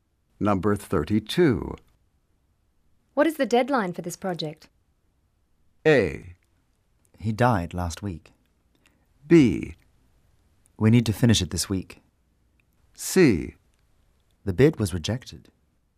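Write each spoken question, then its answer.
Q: What is the deadline for this project?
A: B: We need to finish it this week.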